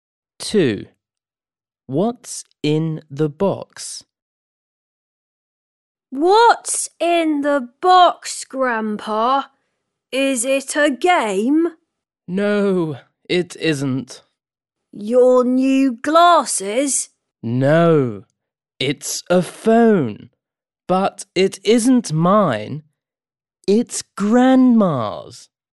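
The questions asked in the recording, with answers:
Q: What's in the box?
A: a phone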